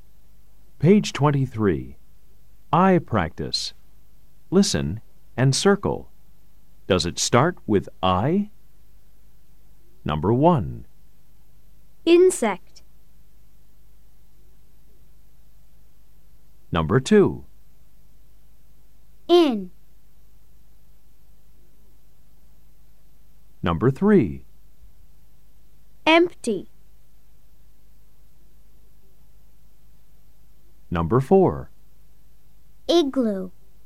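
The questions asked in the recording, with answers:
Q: Does it start with I? Number 1. Insect.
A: Yes

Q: Empty.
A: No

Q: Igloo.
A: Yes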